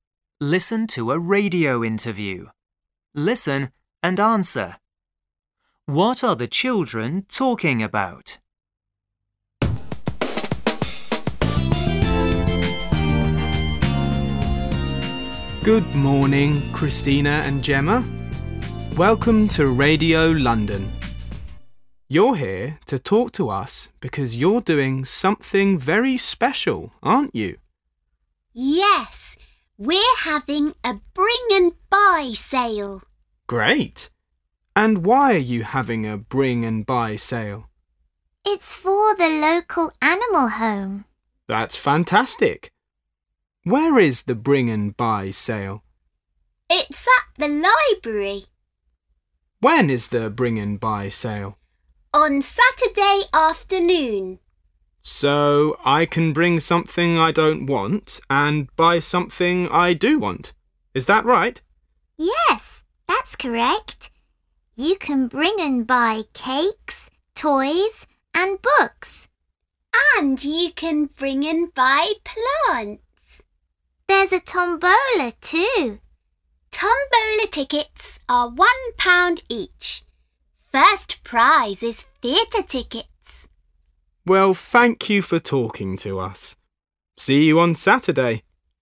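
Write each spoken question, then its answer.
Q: What are the children talking about?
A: A bring and buy sale for the local animal home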